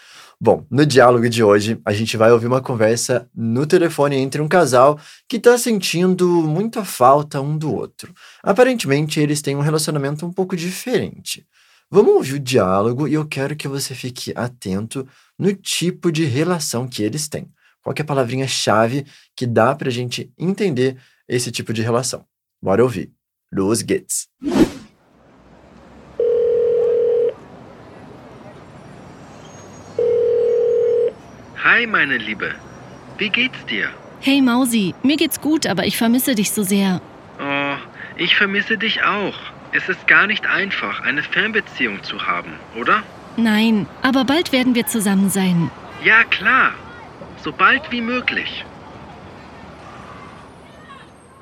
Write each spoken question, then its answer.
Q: Qual que é a palavrinha-chave que dá para a gente entender esse tipo de relação?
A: E aí, conseguiu perceber que eles estão num relacionamento à distância?